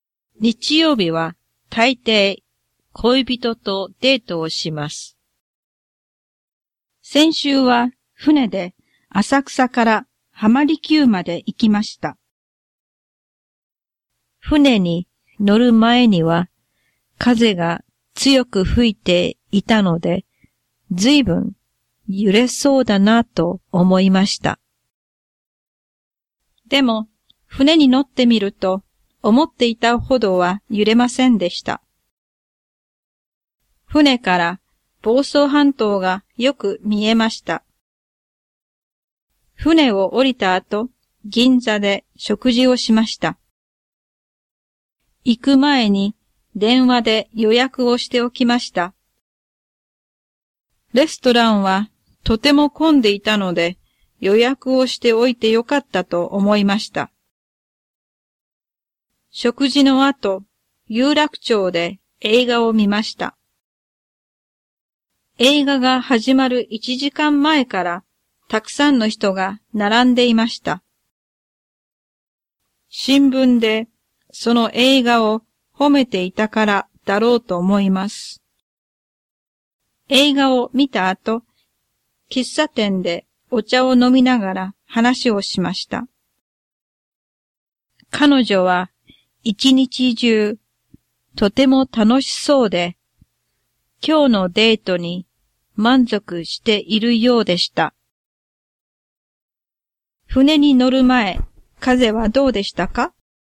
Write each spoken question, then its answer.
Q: 船に乗る前、風はどうでしたか?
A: 強く吹いていました。